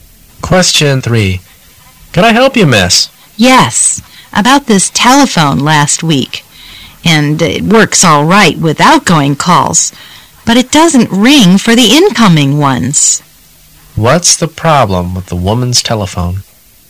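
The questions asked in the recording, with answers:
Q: What's the problem with the woman's telephone?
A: It doesn't ring for incoming calls.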